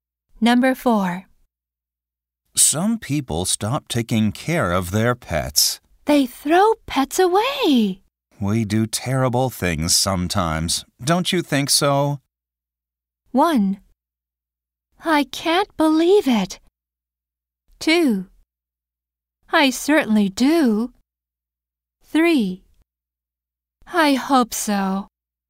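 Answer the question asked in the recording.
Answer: 2: I certainly do.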